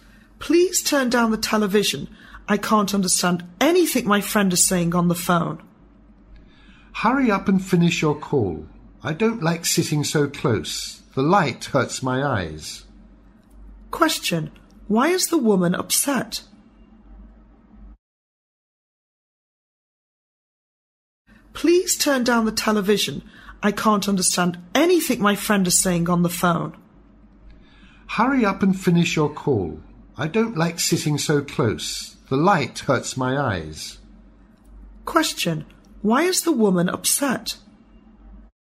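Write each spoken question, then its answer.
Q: Why is the woman upset?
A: She can't hear her friend on the phone because the television is too loud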